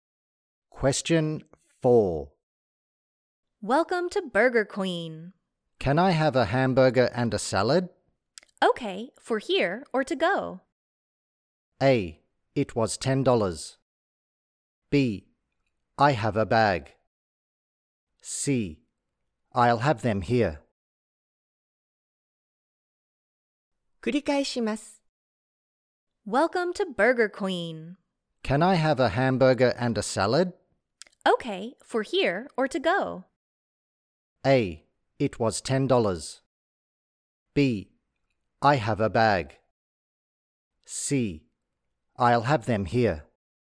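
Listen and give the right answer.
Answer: C: I'll have them here.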